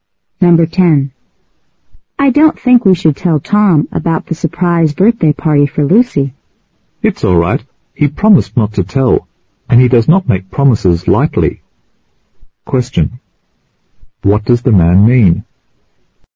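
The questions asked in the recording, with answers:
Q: What does the man mean?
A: Tom can be trusted to keep the secret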